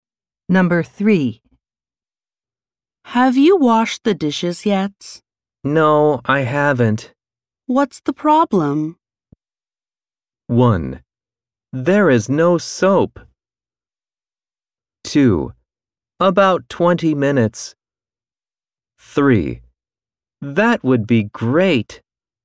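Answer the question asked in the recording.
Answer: 1: There is no soap.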